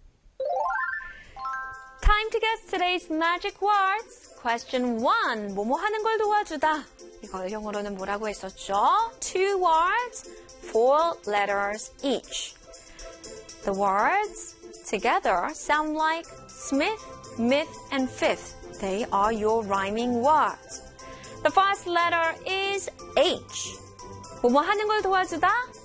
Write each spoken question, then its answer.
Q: 뭐뭐 하는 걸 도와주다. 이걸 영어로는 뭐라고 했었죠? Two words, 4 letters each.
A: Help with. Help with.